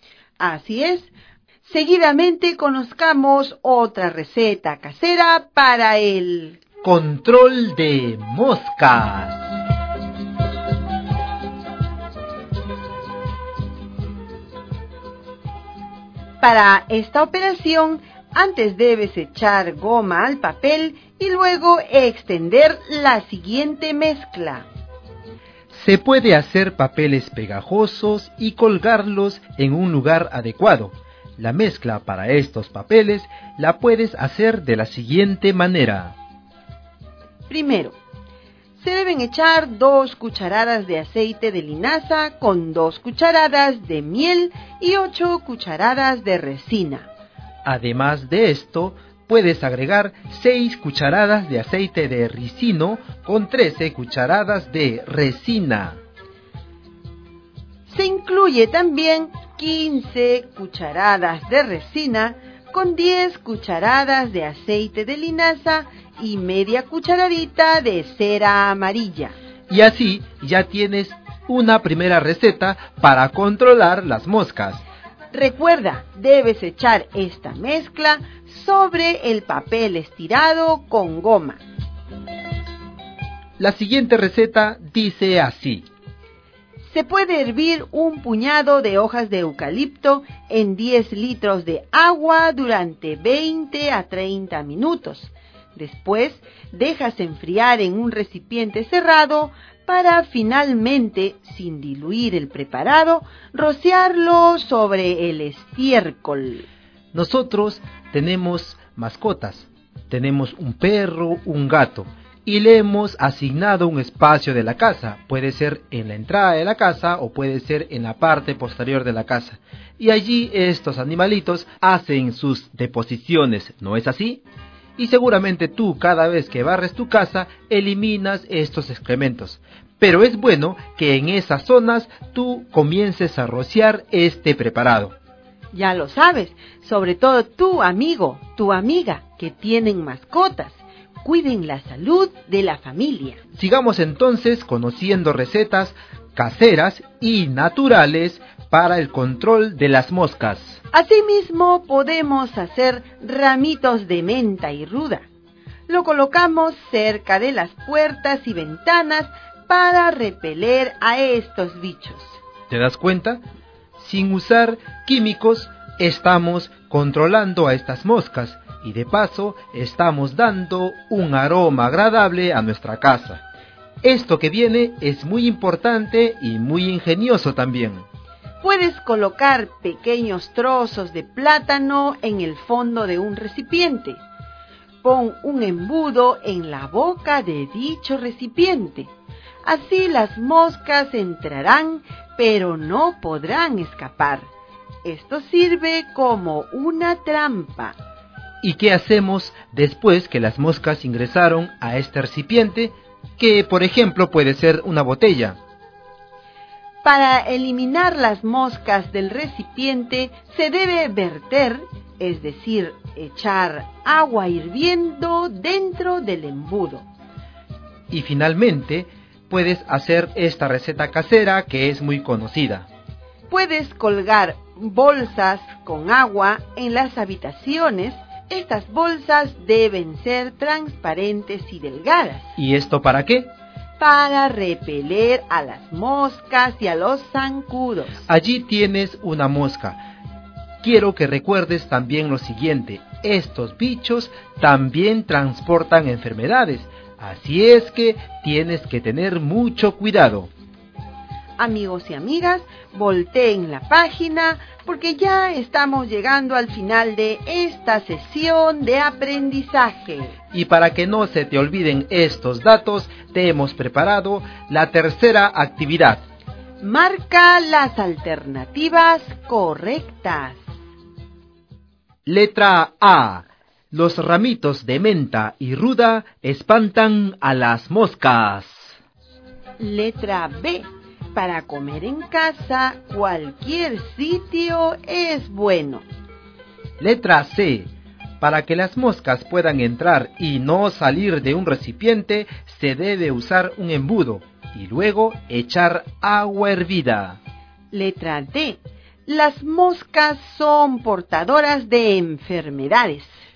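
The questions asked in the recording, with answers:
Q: Marca las alternativas correctas.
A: A, C y D: menta y ruda espantan moscas; embudo y agua hervida; las moscas portan enfermedades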